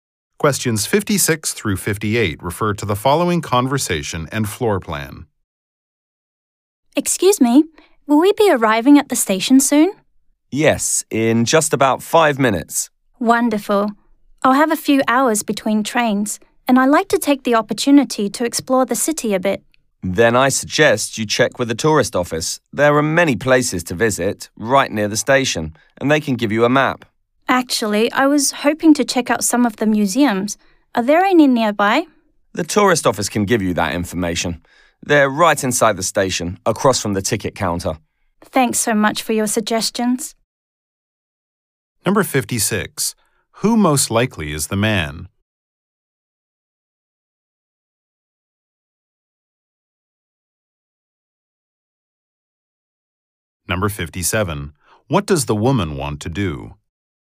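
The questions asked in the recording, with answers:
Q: What does the woman want to do?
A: Explore the city and visit museums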